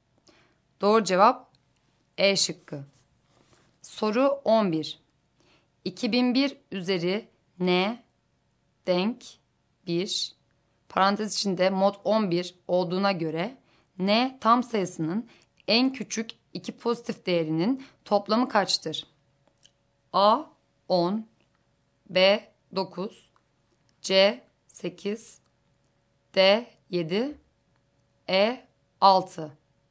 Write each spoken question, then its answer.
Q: 2001 üzeri N denk 1, parantez içinde mod 11 olduğuna göre N tam sayısının en küçük iki pozitif değerinin toplamı kaçtır?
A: Doğru cevap E şıkkı.